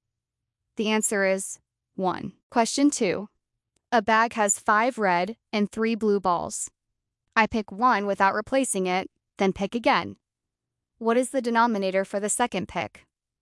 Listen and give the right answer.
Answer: The answer is 7, because 1 ball has been removed.